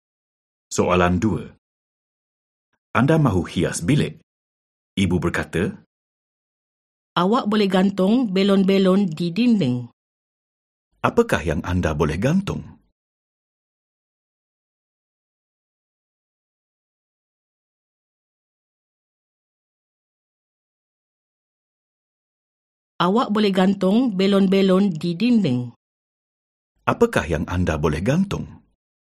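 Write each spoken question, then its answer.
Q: Apakah yang anda boleh gantung?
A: Belon-belon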